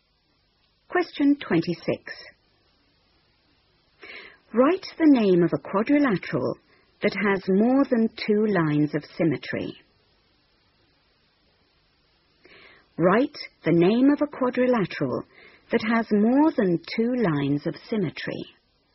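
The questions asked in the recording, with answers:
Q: Write the name of a quadrilateral that has more than two lines of symmetry.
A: Square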